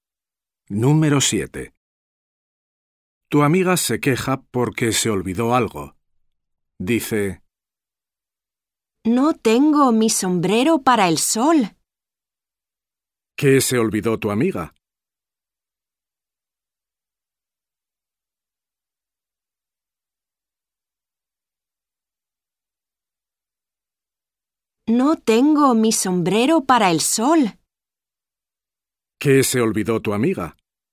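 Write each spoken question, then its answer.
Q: ¿Qué se olvidó tu amiga?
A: Su sombrero para el sol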